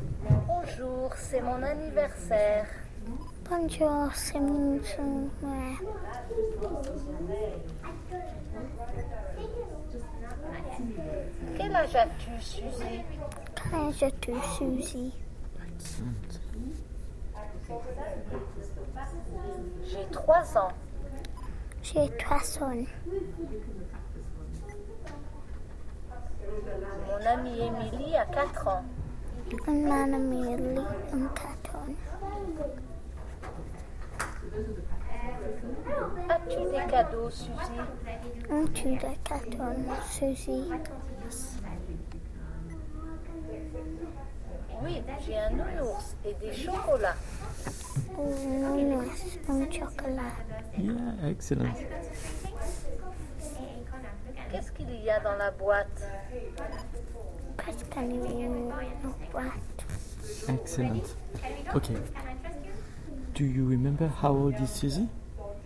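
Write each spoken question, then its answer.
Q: Do you remember how old is Suzy?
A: 3 years old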